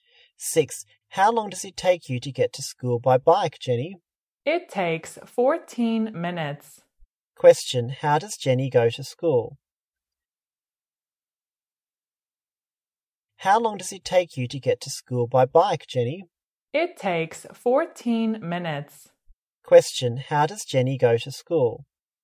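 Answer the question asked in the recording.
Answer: By bike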